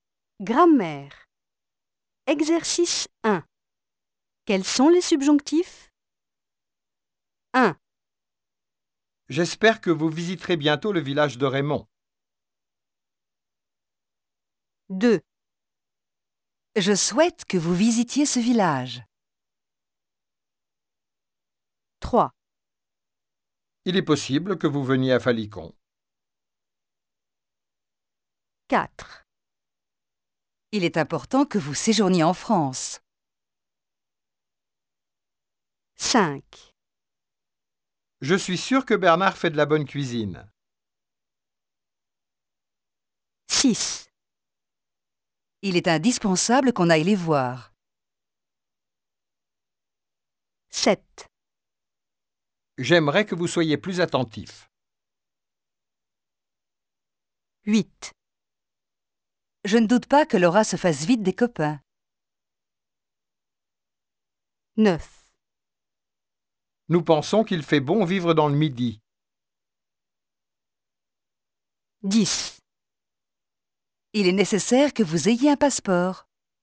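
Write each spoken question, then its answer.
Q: J'espère que vous visiterez bientôt le village de Raymond.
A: Pas de subjonctif (visiterez)

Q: Je souhaite que vous visitiez ce village.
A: Subjonctif: visitiez

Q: Il est possible que vous veniez à Falicon.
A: Subjonctif: veniez

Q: Il est important que vous séjourniez en France.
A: Subjonctif: séjourniez

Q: Je suis sûr que Bernard fait de la bonne cuisine.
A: Pas de subjonctif (fait)

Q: Il est indispensable qu'on aille les voir.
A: Subjonctif: aille

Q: J'aimerais que vous soyez plus attentif.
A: Subjonctif: soyez

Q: Je ne doute pas que Laura se fasse vite des copains.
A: Subjonctif: se fasse

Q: Nous pensons qu'il fait bon vivre dans le midi.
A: Pas de subjonctif (fait)

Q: Il est nécessaire que vous ayez un passeport.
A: Subjonctif: ayez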